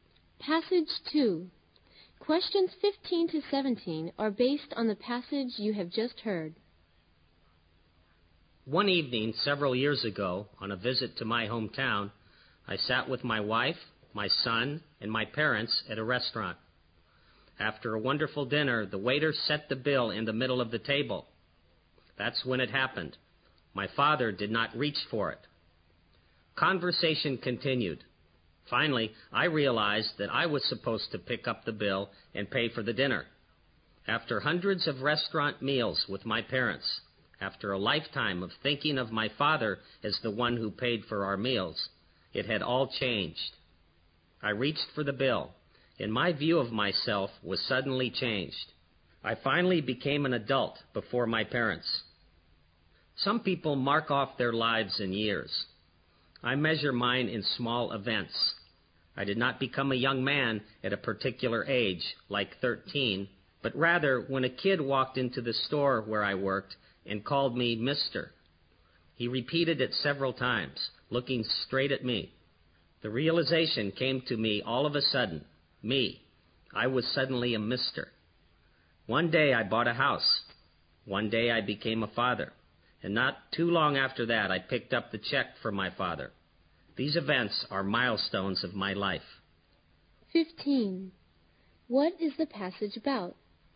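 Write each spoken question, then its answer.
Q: What is the passage about?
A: Small events that mark milestones in his life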